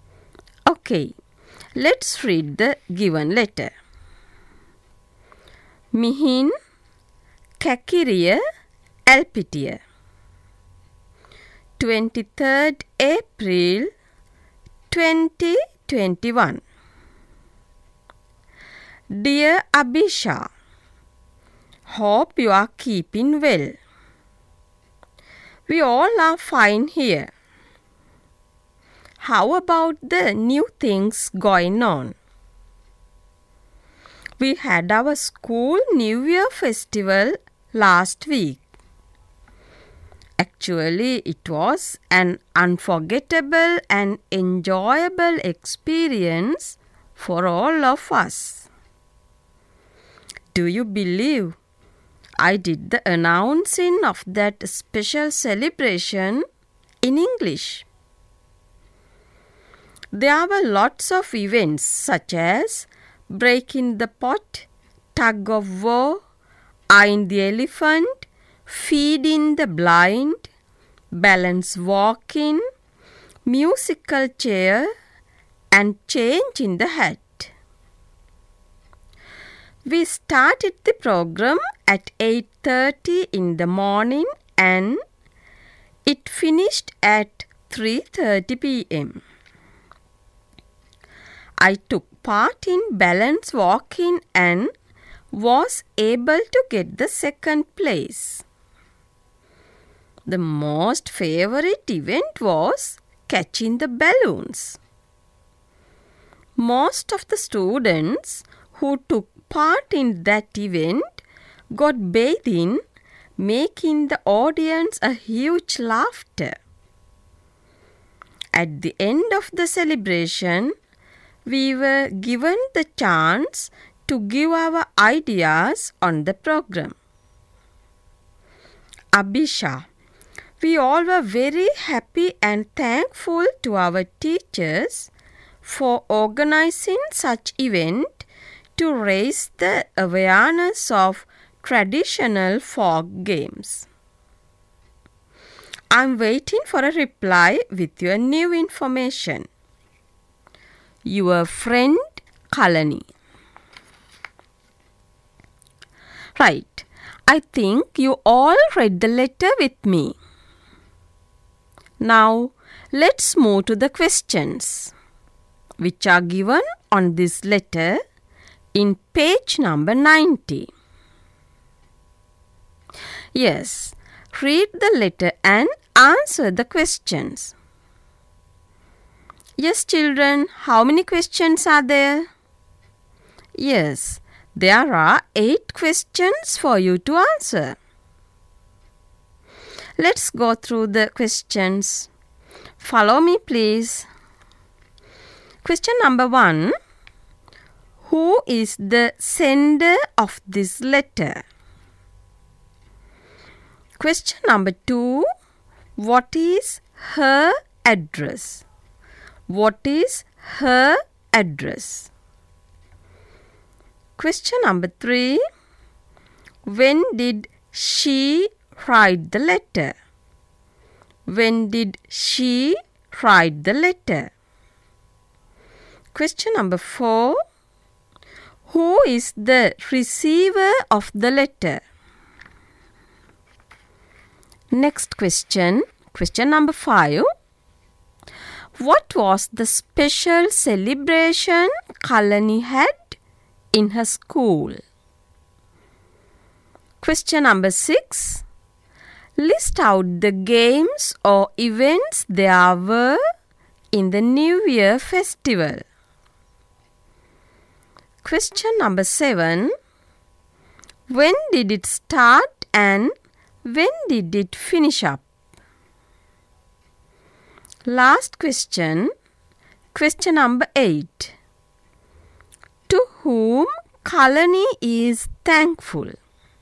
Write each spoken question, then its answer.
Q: Who is the sender of this letter?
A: Here, the writer or the sender is Kalani.

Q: What is her address?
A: Mihin Kakiriya Alpitiya. Yes, you are correct.

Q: When did she write the letter?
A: Yes, answer is 23rd April

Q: Who is the receiver of the letter?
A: Yes, the answer is Abhisha.

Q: What was the special celebration Kalani had in her school?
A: Yes, school New Year festival.

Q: List out the games or events there were in the New Year festival.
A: There were lots of events such as breaking the pot, tug of war, eyeing the elephant, feeding the blind, balance walking, musical chair, changing the hat, and catching the balloons.

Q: When did it start and when did it finish up?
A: It started at 8:30 in the morning and it finished at 3:30 p.m.

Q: To whom Kalani is thankful?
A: To their teachers.